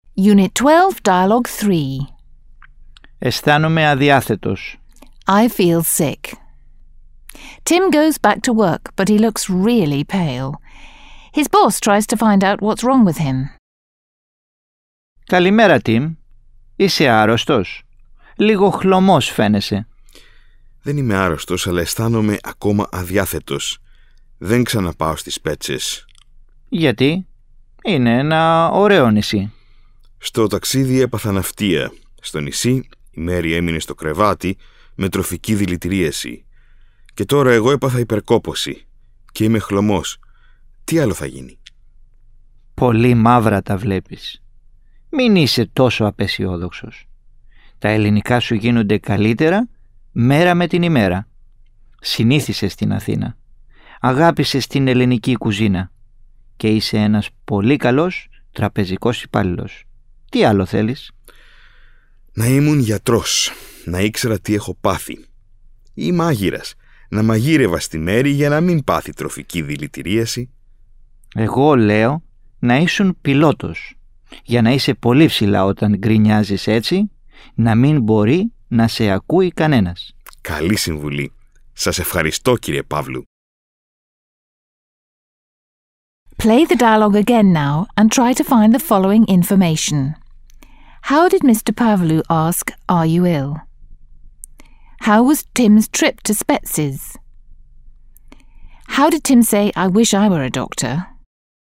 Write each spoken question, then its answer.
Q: How did Mr. Pavlou ask, "Are you ill?"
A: Mr. Pavlou asked, "Είσαι άρρωστος?"

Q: How was Tim's trip to Spetses?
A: Tim's trip to Spetses was an awful experience.

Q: How did Tim say, "I wish I were a doctor"?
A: Tim said, "Να ήμουν γιατρός."